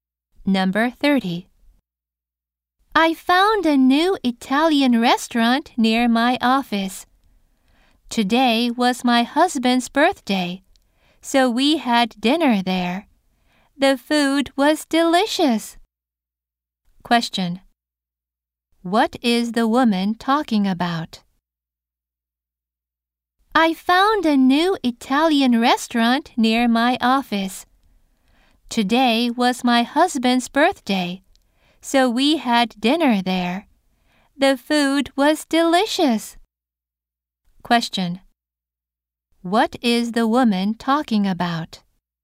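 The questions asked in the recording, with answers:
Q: What is the woman talking about?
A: Having dinner at a new Italian restaurant for her husband's birthday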